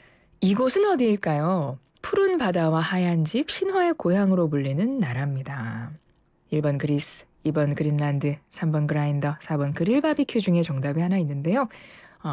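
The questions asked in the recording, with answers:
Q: 이곳은 어디일까요? 푸른 바다와 하얀 집, 신화의 고향으로 불리는 나라입니다.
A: 1번: 그리스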